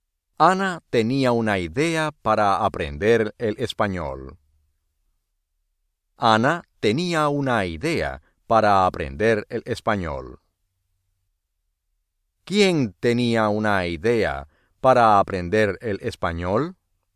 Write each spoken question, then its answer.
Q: ¿Quién tenía una idea para aprender el español?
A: Ana.